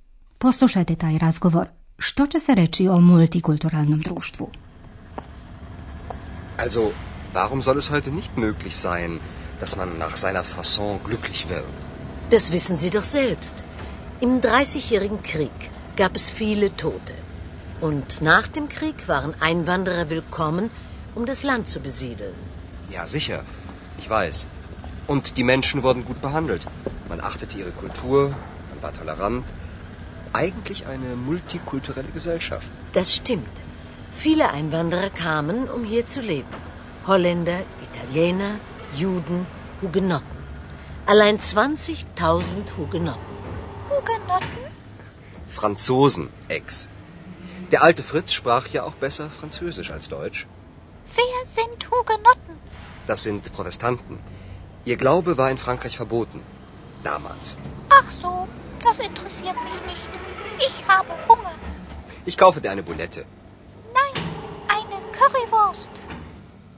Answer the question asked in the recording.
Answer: Andreja zaključuje, ljudi su bili tolerantni, na kraju je to bilo jedno multikulturalno društvo.